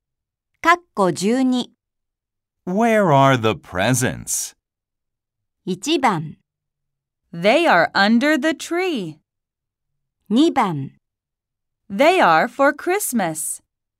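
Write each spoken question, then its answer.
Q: Where are the presents?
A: 1: They are under the tree.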